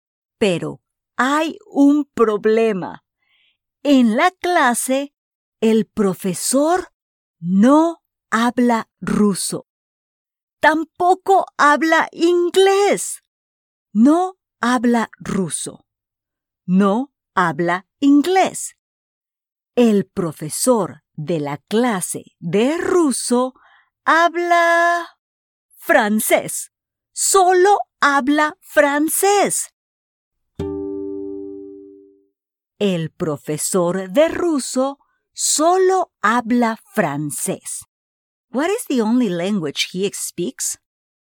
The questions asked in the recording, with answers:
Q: What is the only language he speaks?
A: Correcto. He only speaks French.